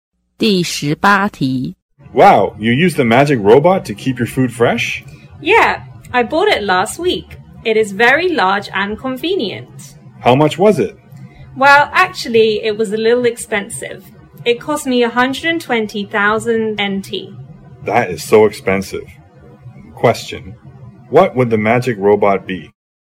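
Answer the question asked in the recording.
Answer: A refrigerator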